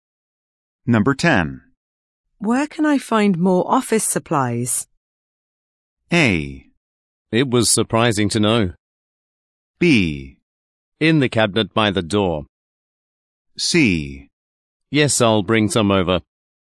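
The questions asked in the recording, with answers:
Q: Where can I find more office supplies?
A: B: In the cabinet by the door.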